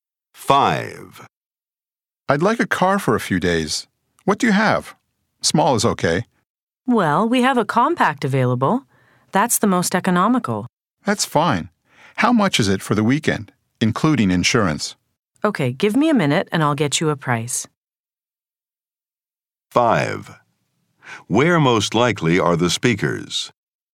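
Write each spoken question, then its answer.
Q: Where most likely are the speakers?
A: At a car rental agency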